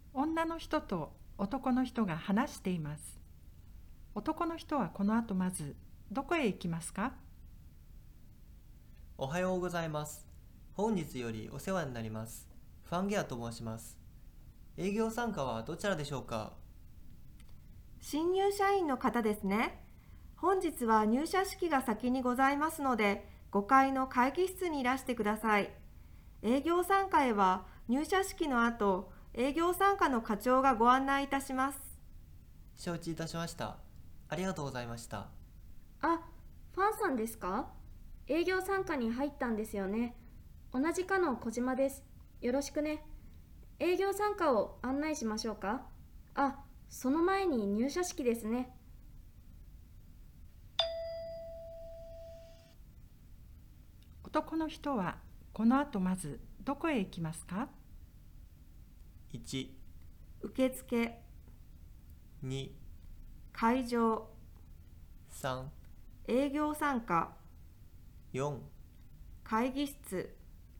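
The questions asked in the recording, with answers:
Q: 男の人はこの後まずどこへ行きますか?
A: 4: 会議室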